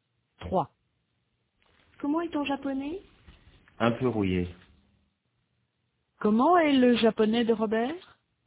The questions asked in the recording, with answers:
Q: Comment est le japonais de Robert?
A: Un peu rouillé.